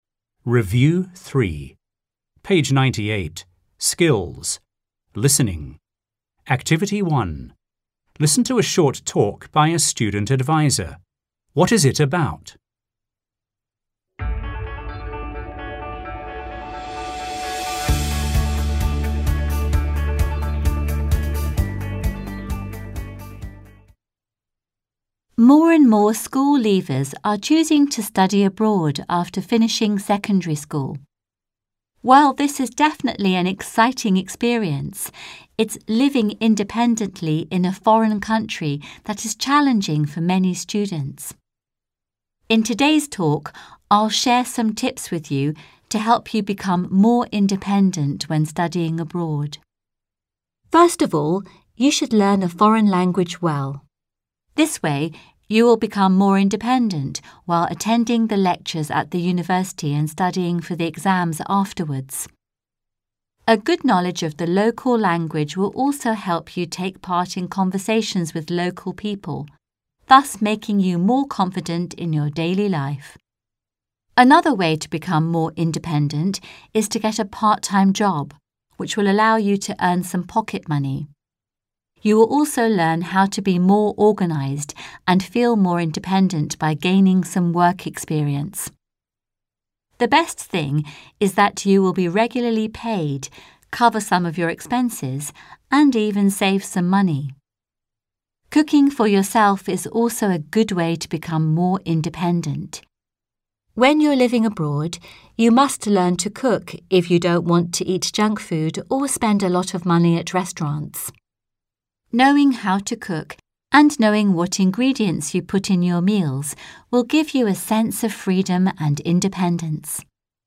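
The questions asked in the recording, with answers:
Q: What is it about?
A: Tips to help students become more independent when studying abroad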